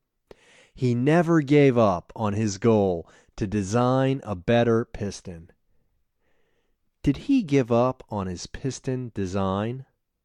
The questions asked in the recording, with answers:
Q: Did he give up on his piston design?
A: No, he never gave up on his piston design.